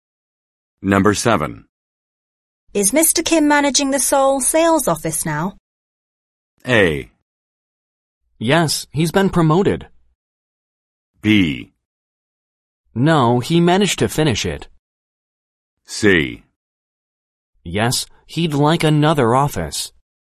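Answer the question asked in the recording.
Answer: A: Yes, he's been promoted.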